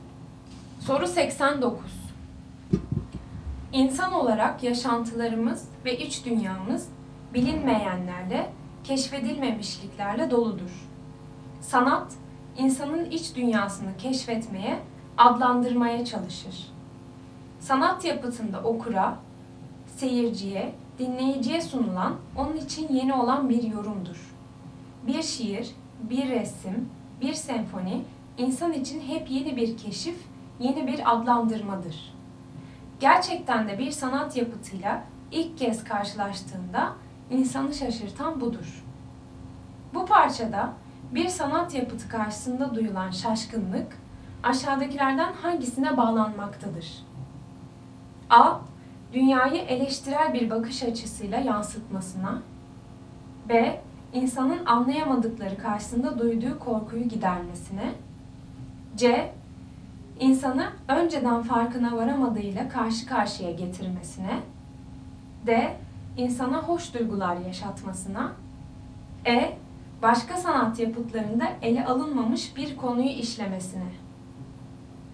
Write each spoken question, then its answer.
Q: Bu parçada bir sanat yapıtı karşısında duyulan şaşkınlık, aşağıdakilerden hangisine bağlanmaktadır?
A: Doğru cevap C. İnsanı önceden farkına varamadığıyla karşı karşıya getirmesine.